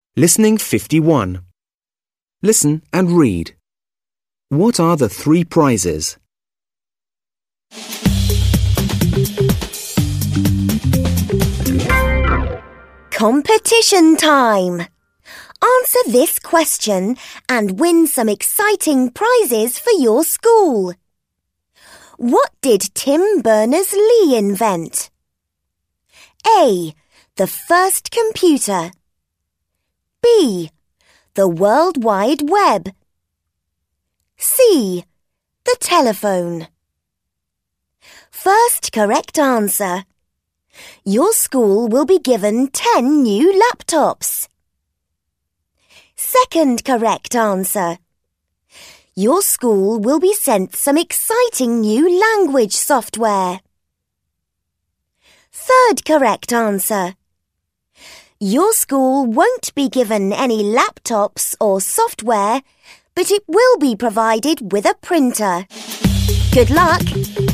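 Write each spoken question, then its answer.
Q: What are the three prizes?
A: 10 new laptops, some new language software, and a printer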